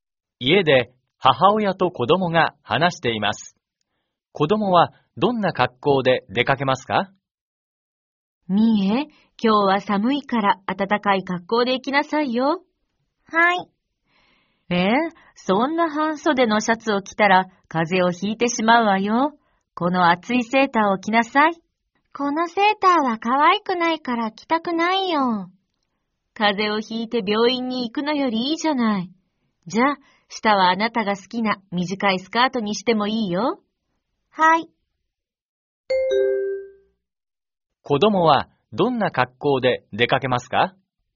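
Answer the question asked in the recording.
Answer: 厚いセーターと短いスカート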